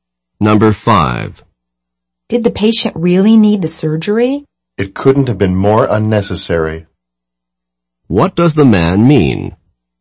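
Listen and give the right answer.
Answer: The surgery was completely unnecessary.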